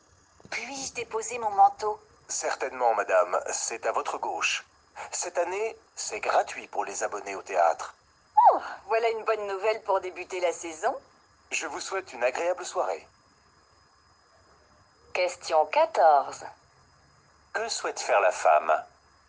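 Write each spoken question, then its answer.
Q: Que souhaite faire la femme ?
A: Déposer son manteau au vestiaire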